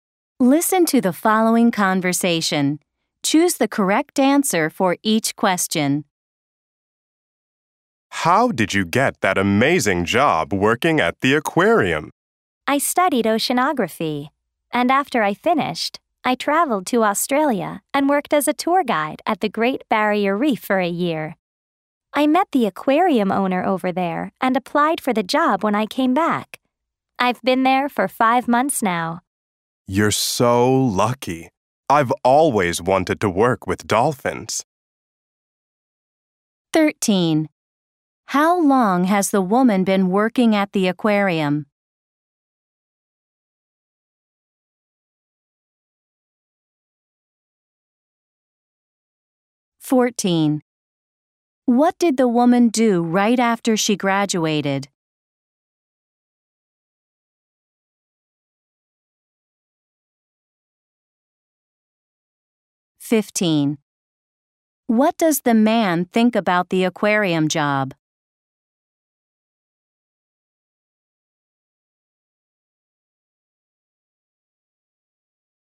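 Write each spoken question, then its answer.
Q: How long has the woman been working at the aquarium?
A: 5 months

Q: What did the woman do right after she graduated?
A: She went to Australia and worked as a tour guide at the Great Barrier Reef

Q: What does the man think about the aquarium job?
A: He thinks she is lucky; he has always wanted to work with dolphins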